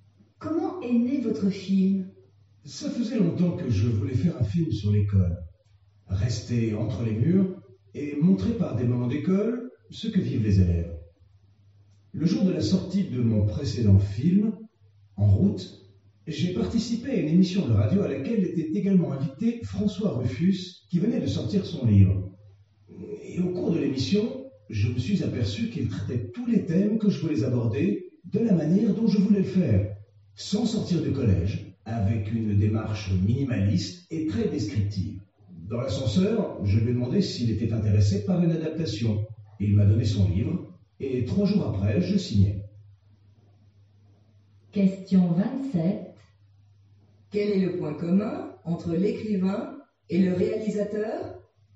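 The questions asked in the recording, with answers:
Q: Quel est le point commun entre l'écrivain et le réalisateur ?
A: Ils voulaient traiter les mêmes thèmes sur l'école, de la même manière : sans sortir du collège, avec une démarche minimaliste et descriptive.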